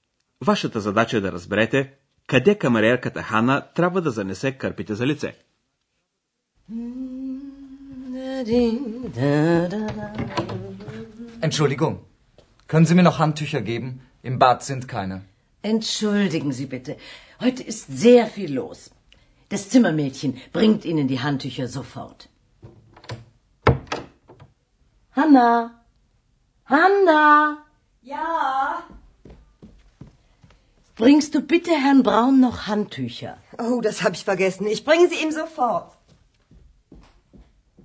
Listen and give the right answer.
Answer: Hanna трябва да занесе кърпите за лице на господин Браун.